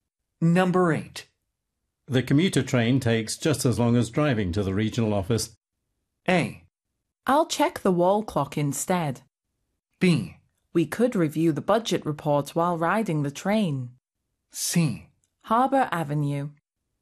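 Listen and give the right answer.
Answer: B: We could review the budget report while riding the train.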